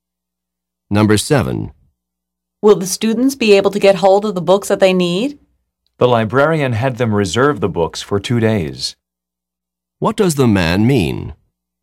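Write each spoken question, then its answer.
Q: What does the man mean?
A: The librarian had the students reserve the books for two days.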